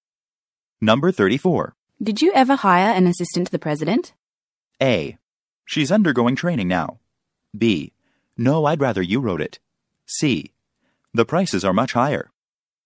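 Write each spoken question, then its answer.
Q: Did you ever hire an assistant to the president?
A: A: She's undergoing training now.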